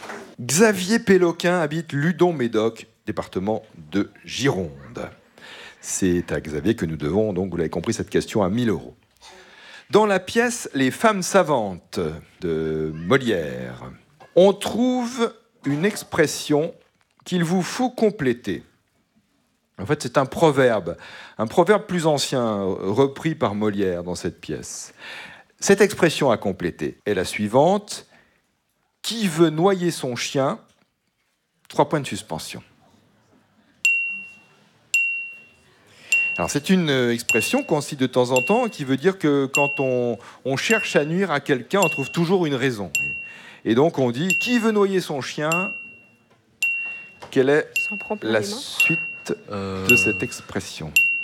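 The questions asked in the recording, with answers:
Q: Et donc on dit « Qui veut noyer son chien ?» Quelle est la suite de cette expression ?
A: l'accuse de la rage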